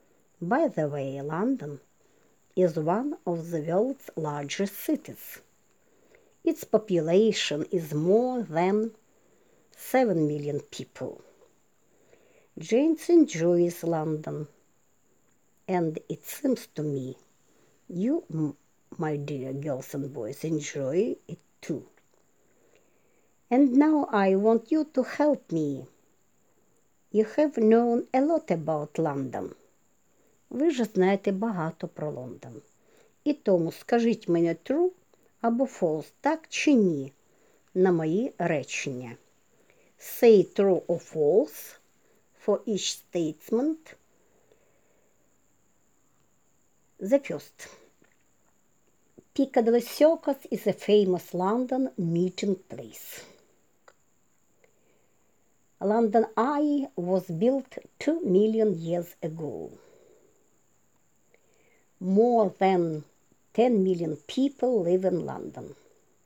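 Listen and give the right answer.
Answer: False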